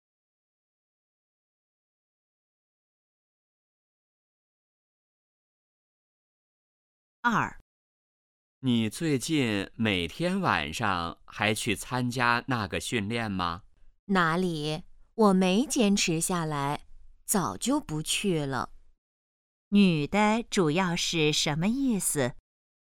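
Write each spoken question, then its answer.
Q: 女的主要是什么意思?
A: 她早就不去参加训练了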